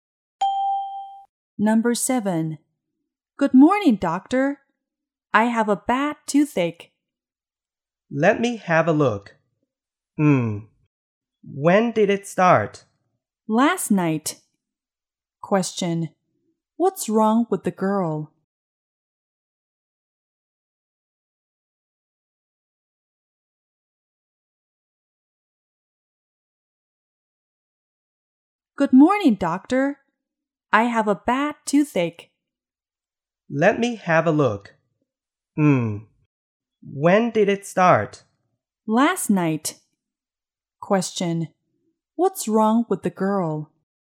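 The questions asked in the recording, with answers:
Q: What's wrong with the girl?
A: She has a bad toothache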